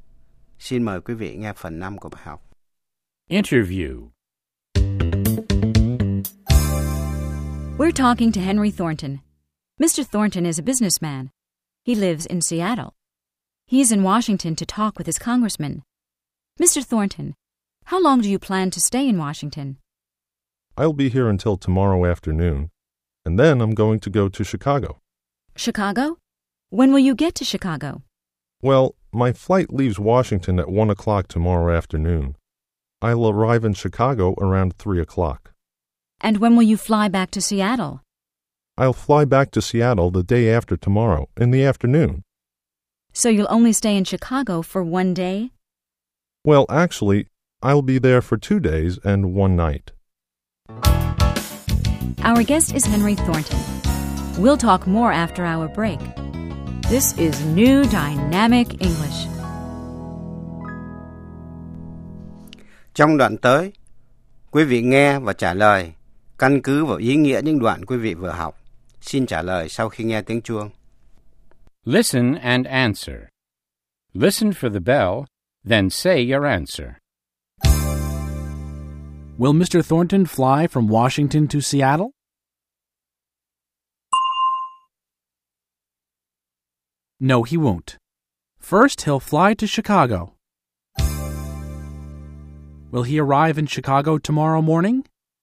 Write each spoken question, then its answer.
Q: Will he arrive in Chicago tomorrow morning?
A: No, he won't. He'll arrive tomorrow afternoon.